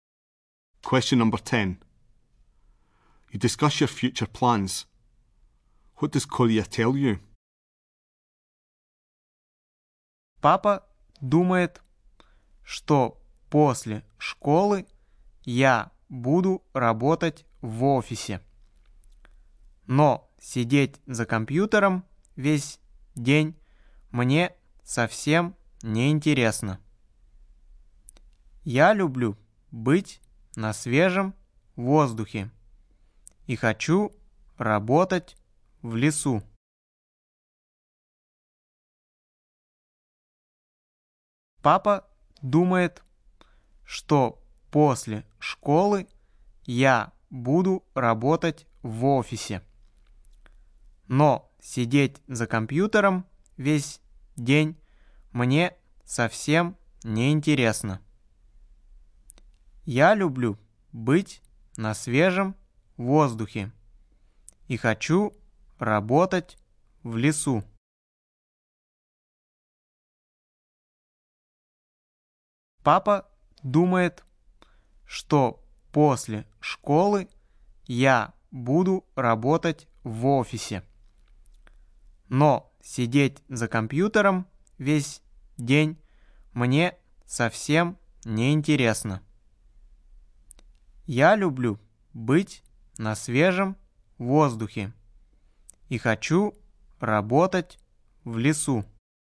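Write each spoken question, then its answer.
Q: What does Kolya tell you?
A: His dad thinks he'll work in an office, but he wants to work outdoors in the forest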